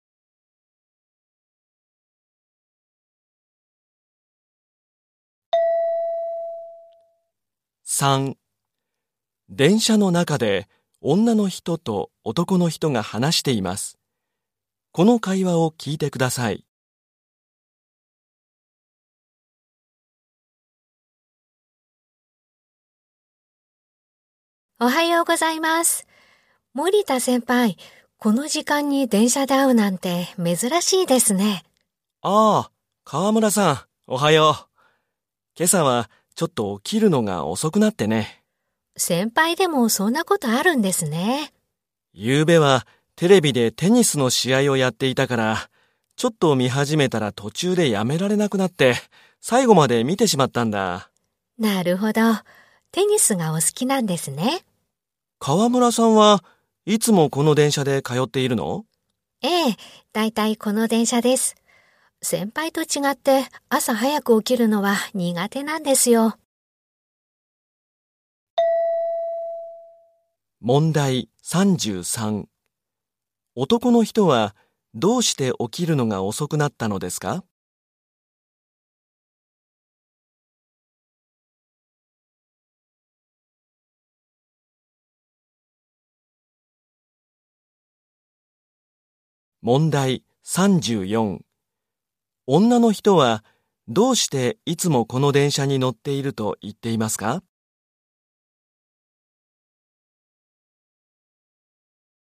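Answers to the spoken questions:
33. 夜テレビでテニスの試合を最後まで見たから
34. 朝早く起きるのが苦手だから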